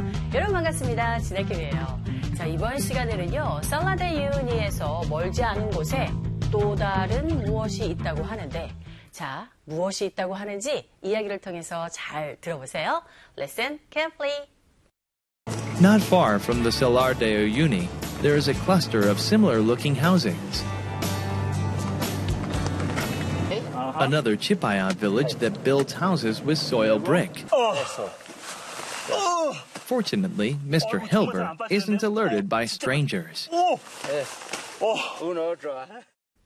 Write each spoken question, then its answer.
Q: 살라데 유니에서 멀지 않은 곳에 또 다른 무엇이 있다고 하는데 자, 무엇이 있다고 하는지 이야기를 통해서 잘 들어보세요.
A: 바로 비슷하게 생긴 주택 단지들이 있다고 하죠.